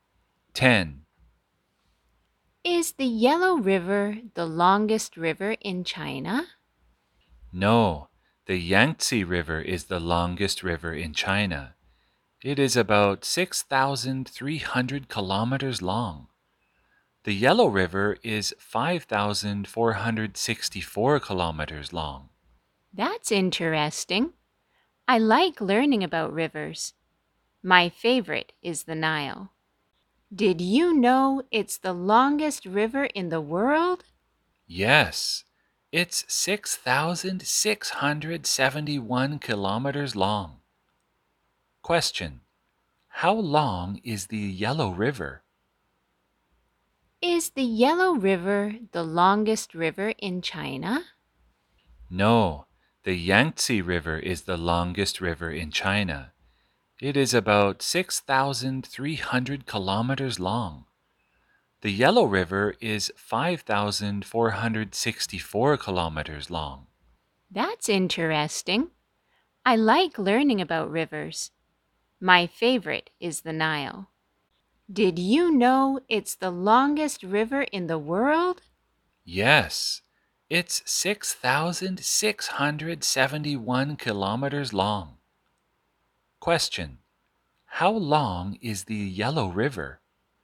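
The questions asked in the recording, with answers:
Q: How long is the Yellow River?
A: 5,464 kilometers long.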